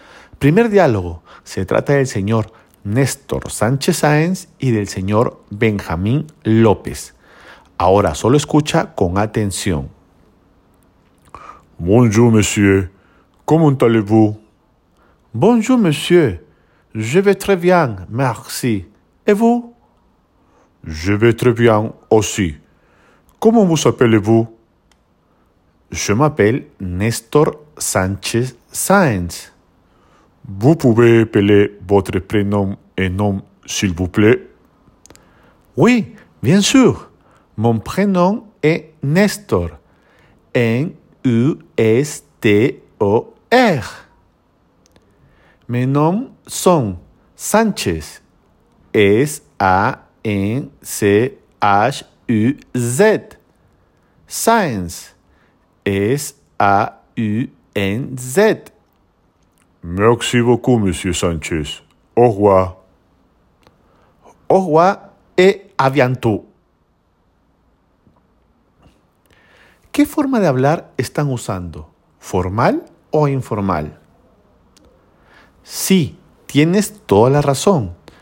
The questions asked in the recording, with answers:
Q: ¿Qué forma de hablar están usando? ¿Formal o informal?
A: Están usando lenguaje formal